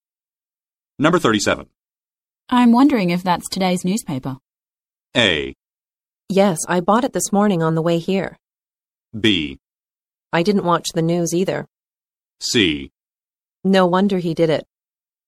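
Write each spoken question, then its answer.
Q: I'm wondering if that's today's newspaper.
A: A: Yes, I bought it this morning on the way here.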